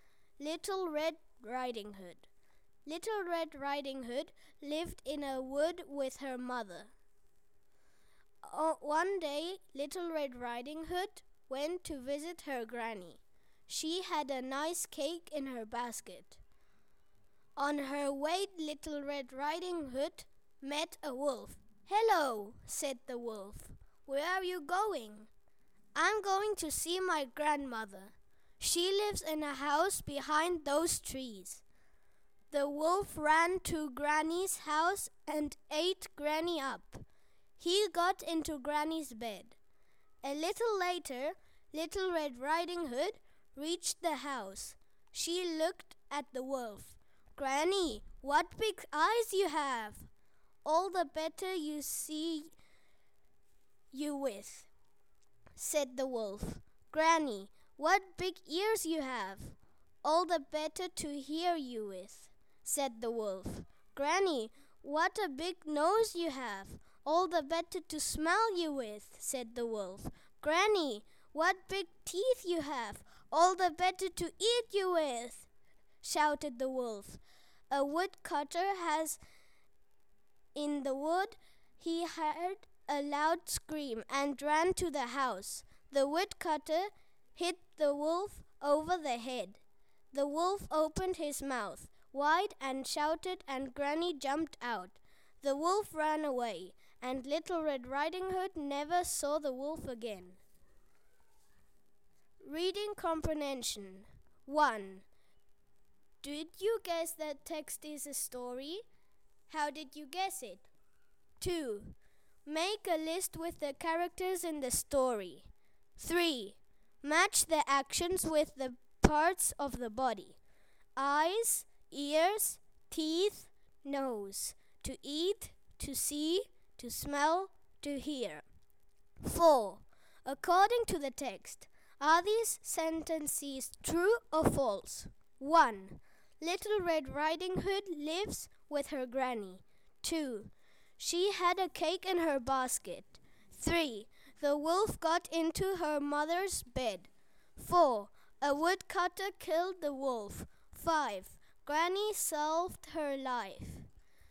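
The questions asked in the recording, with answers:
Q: Little Red Riding Hood lives with her granny.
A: False

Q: She had a cake in her basket.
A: True

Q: The wolf got into her mother's bed.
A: False

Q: A woodcutter killed the wolf.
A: False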